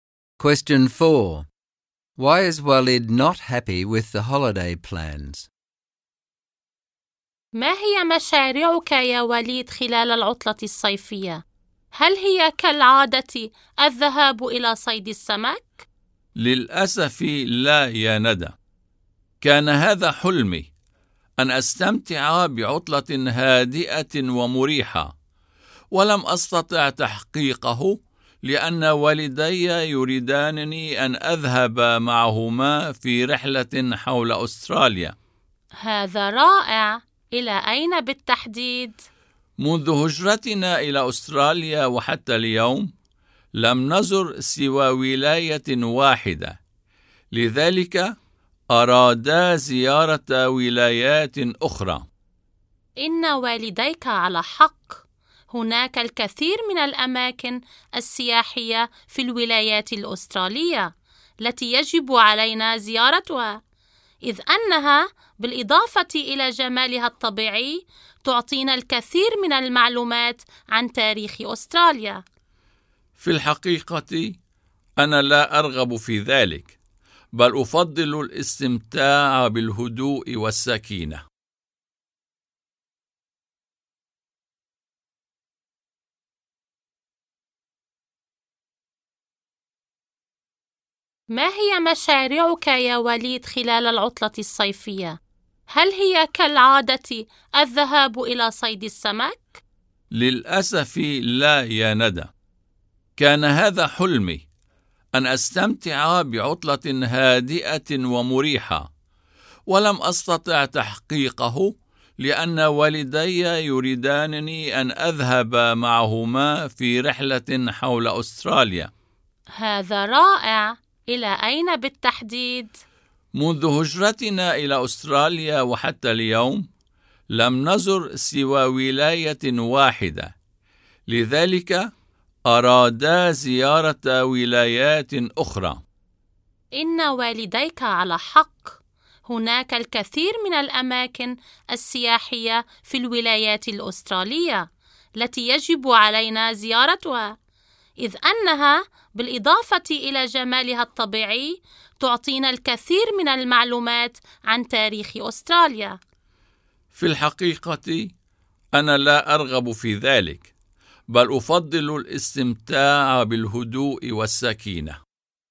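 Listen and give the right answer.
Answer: He wanted a quiet, relaxing holiday, like his usual fishing, but his parents want him to go with them on a trip around Australia.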